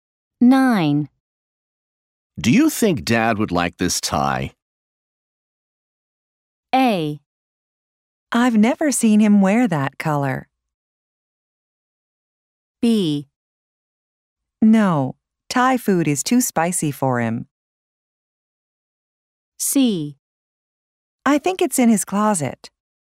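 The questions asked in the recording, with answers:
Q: Do you think Dad would like this tie?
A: A: I've never seen him wear that color.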